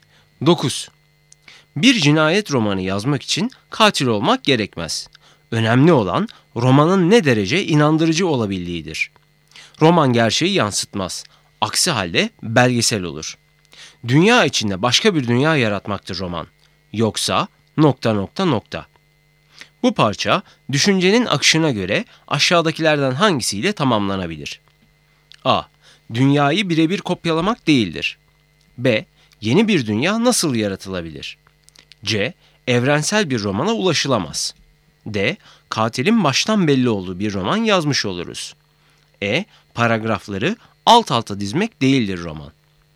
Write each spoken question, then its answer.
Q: Bu parça düşüncenin akışına göre aşağıdakilerden hangisiyle tamamlanabilir?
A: Doğru cevap A. Dünyayı birebir kopyalamak değildir.